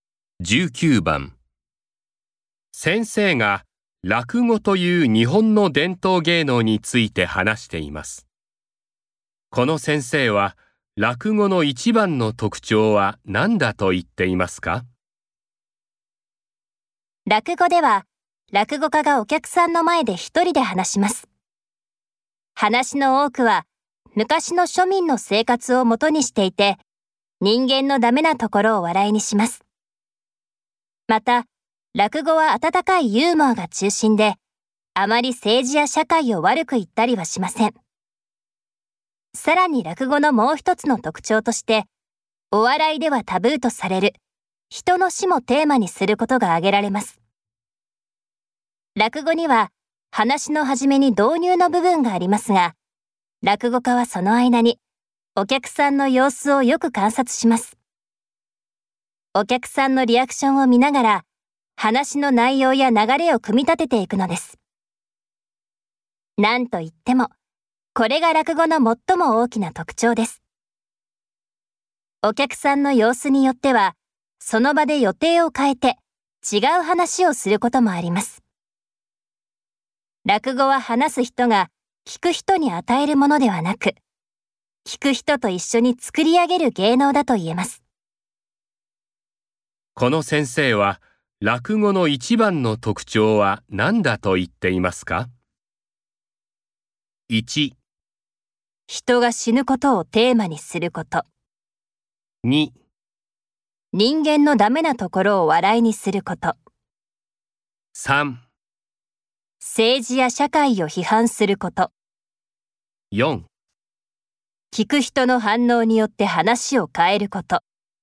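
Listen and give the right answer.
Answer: 4: 聞く人の反応によって話を変えること。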